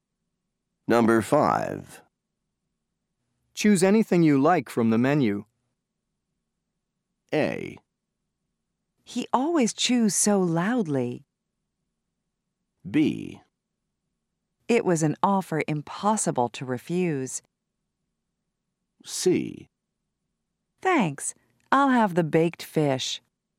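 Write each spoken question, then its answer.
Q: Choose anything you like from the menu.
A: C: Thanks. I'll have the baked fish.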